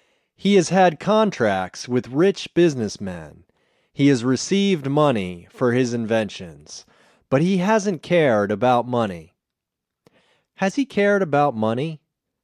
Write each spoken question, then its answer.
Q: Has he cared about money?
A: No, he hasn't cared about money.